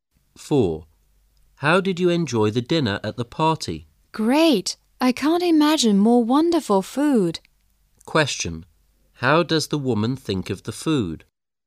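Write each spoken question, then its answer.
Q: How does the woman think of the food?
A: It was wonderful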